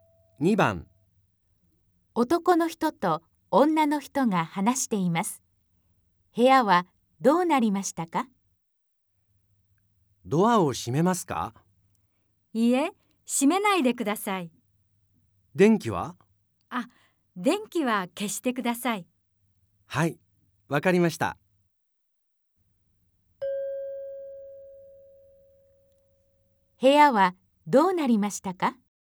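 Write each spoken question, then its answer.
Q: 部屋はどうなりましたか?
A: ドアは開いていて、電気は消えている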